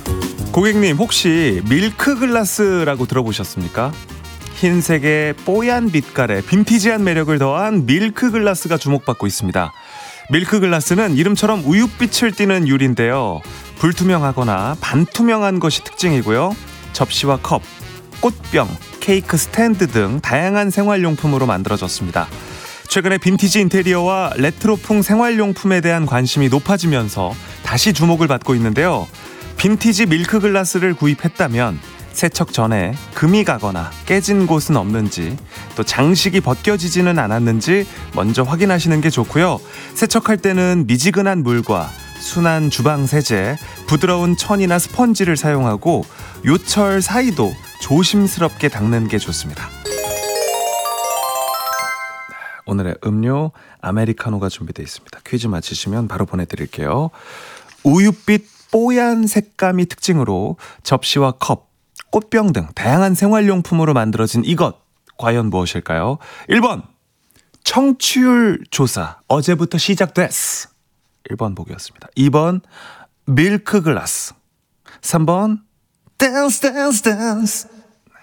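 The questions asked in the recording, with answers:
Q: 우윳빛 뽀얀 색감이 특징으로 접시와 컵, 꽃병 등 다양한 생활용품으로 만들어진 이것, 과연 무엇일까요?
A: 2: 밀크글라스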